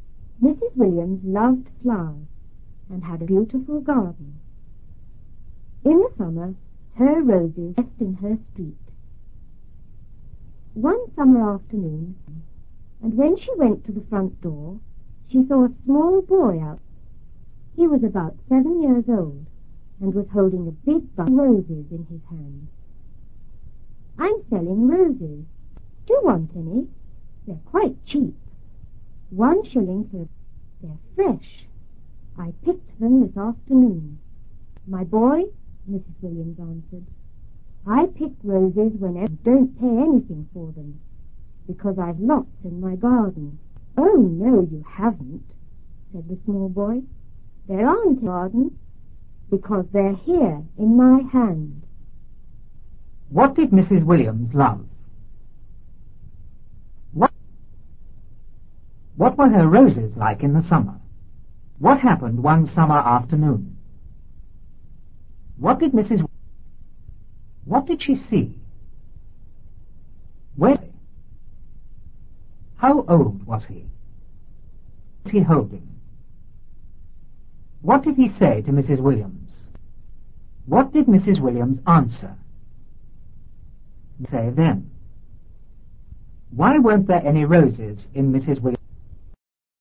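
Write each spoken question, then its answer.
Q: What did Mrs. Williams love?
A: Flowers

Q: What did she see?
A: A small boy

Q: How old was he?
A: About 7 years old

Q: What was he holding?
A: A big bunch of roses

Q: What did Mrs. Williams answer?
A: She didn't pay for roses because she had lots in her garden

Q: Why weren't there any roses in Mrs. Williams?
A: Because the boy had picked them; they were in his hand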